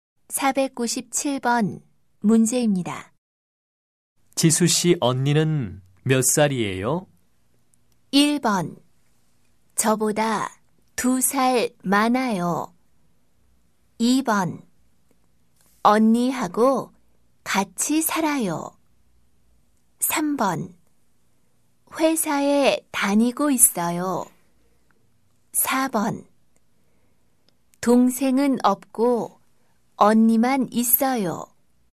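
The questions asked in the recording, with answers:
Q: 지수 씨 언니는 몇 살이에요?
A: 1: 저보다 2살 많아요.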